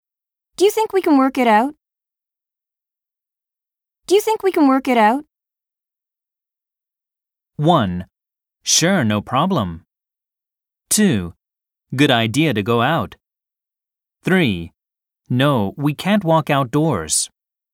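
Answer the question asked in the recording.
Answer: 1: Sure, no problem.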